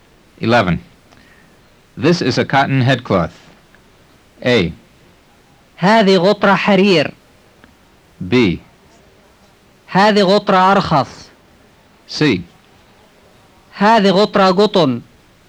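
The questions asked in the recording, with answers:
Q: This is a cotton headcloth.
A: C: هذه غطرة قطن.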